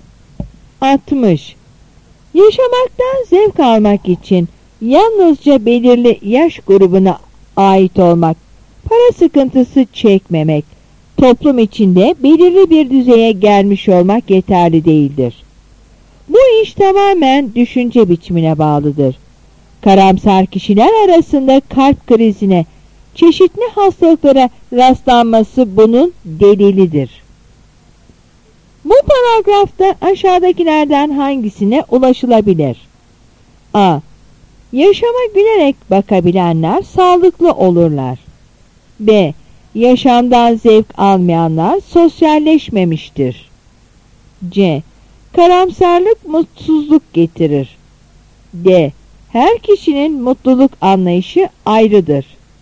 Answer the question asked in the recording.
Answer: Yanıt A.